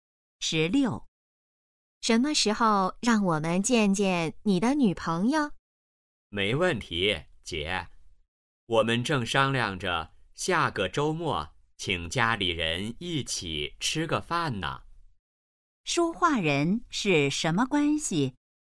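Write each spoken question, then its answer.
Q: 说话人是什么关系?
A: 姐弟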